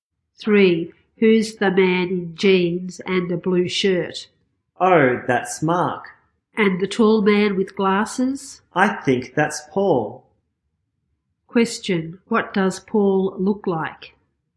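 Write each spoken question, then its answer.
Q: Question, what does Paul look like?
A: He is tall and wears glasses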